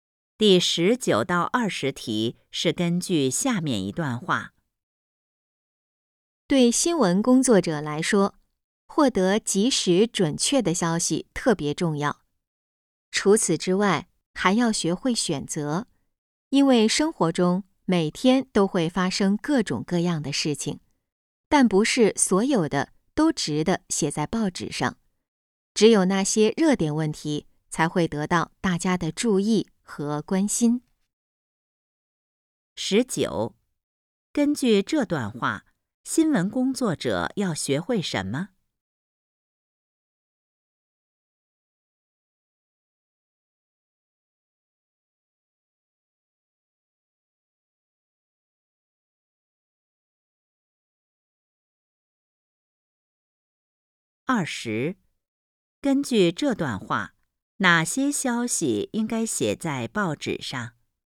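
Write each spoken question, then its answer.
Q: 十九,根据这段话,新闻工作者要学会什么?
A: 学会选择

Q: 二十,根据这段话,哪些消息应该写在报纸上?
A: 热点问题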